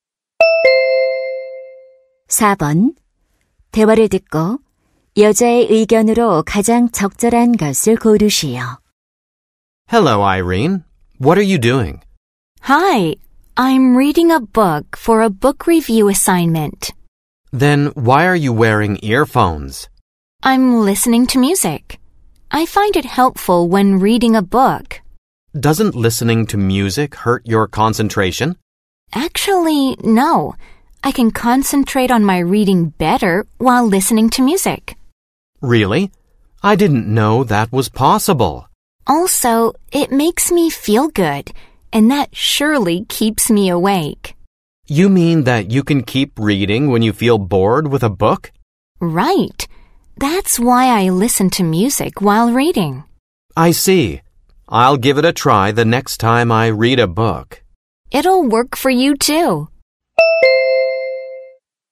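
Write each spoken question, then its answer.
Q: 대화를 듣고 여자의 의견으로 가장 적절한 것을 고르시오.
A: 독서할 때 음악을 들으면 도움이 된다.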